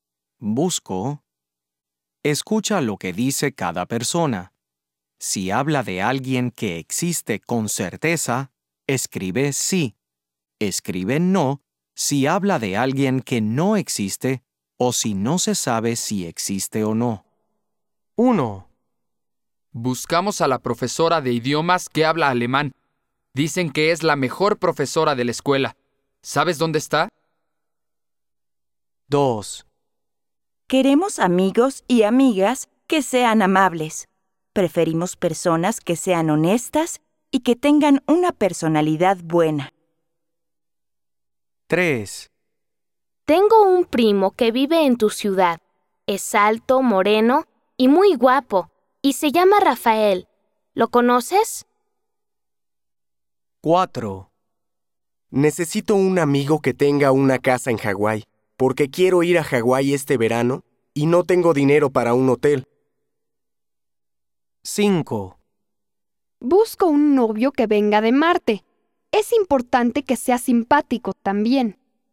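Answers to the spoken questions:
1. sí
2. no
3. sí
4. no
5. no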